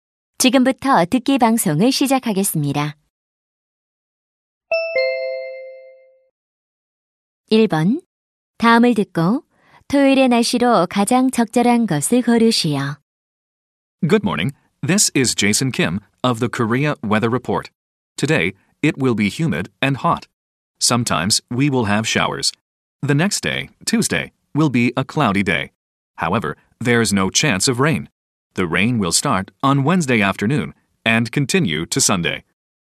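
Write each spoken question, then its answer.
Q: 다음을 듣고 토요일의 날씨로 가장 적절한 것을 고르시오.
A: 비가 옴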